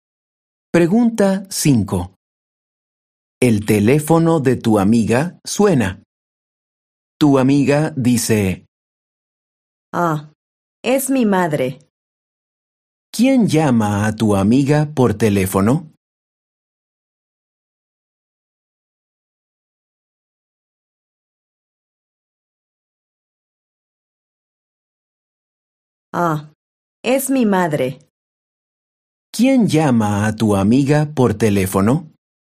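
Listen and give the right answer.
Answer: su madre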